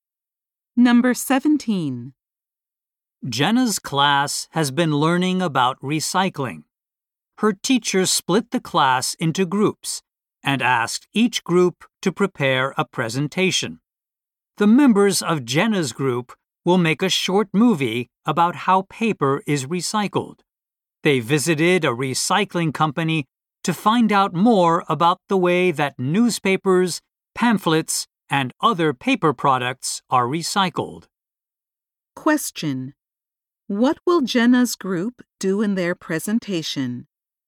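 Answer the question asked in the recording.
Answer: Show a short movie about how paper is recycled.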